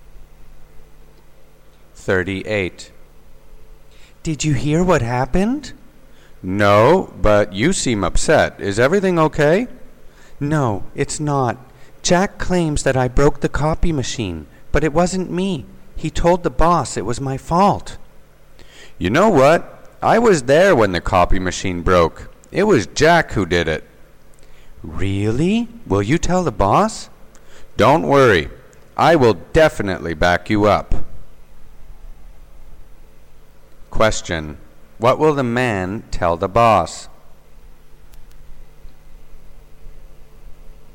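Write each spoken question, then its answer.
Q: What will the man tell the boss?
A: That Jack broke the copy machine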